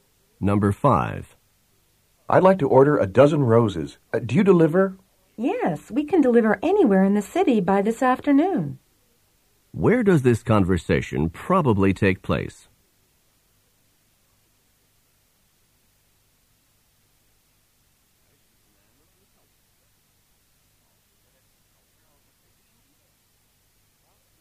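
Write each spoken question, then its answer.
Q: Where does this conversation probably take place?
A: At a flower shop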